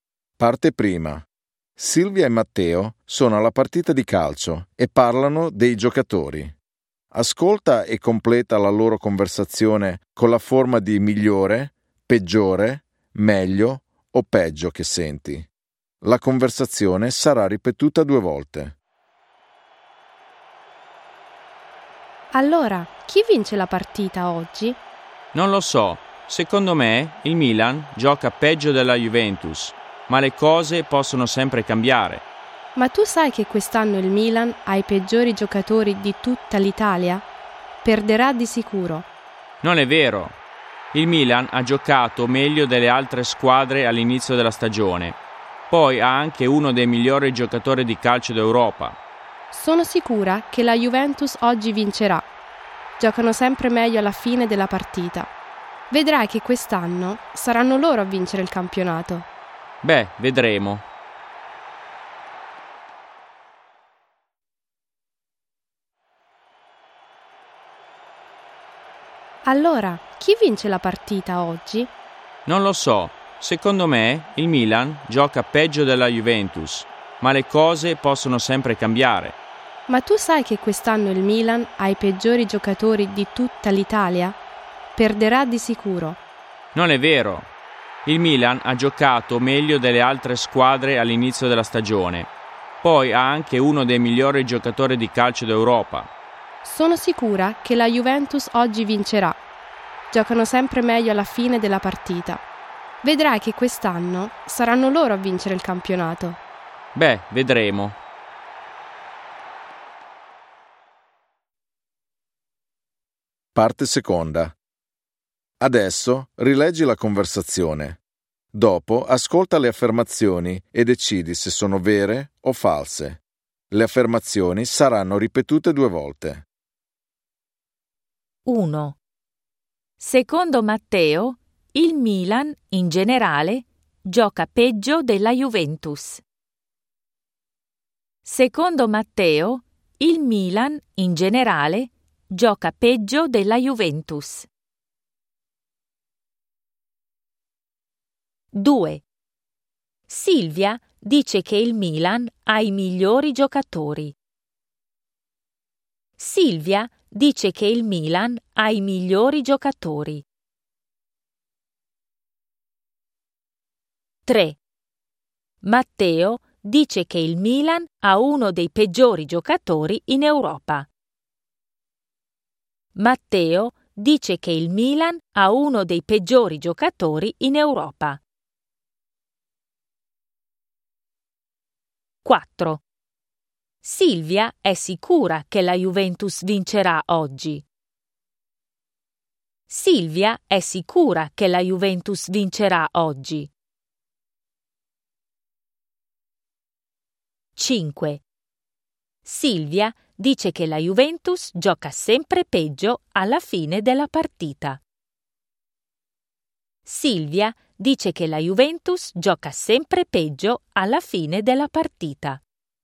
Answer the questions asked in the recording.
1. Vero.
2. Falso.
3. Falso.
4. Vero.
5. Falso.